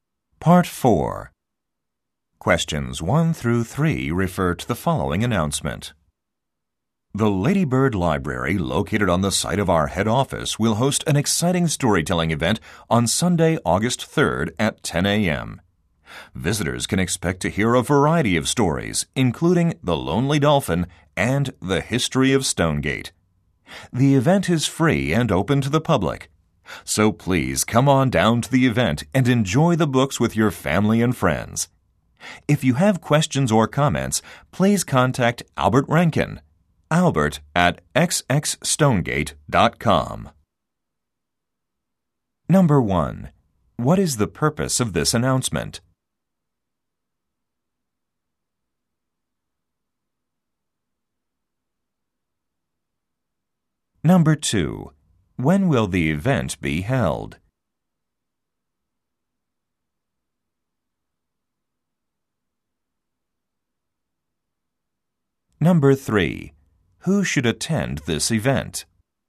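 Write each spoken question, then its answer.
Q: What is the purpose of this announcement?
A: To announce a storytelling event

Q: When will the event be held?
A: Sunday, August 3rd at 10 a.m.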